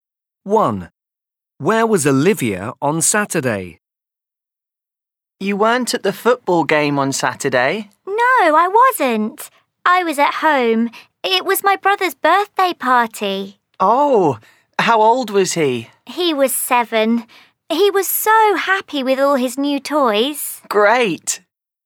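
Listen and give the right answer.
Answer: At home (her brother's birthday party)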